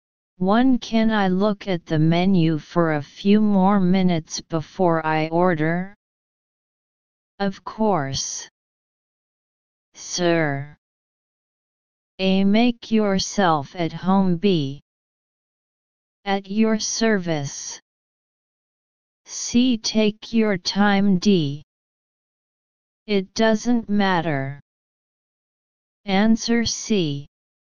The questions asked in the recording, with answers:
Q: Can I look at the menu for a few more minutes before I order? Of course, sir.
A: Answer C.